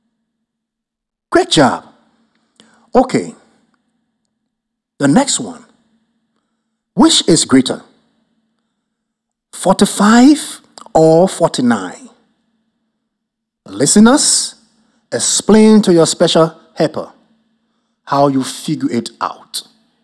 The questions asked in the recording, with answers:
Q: which is greater, 45 or 49?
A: I know, 49 is greater than 45.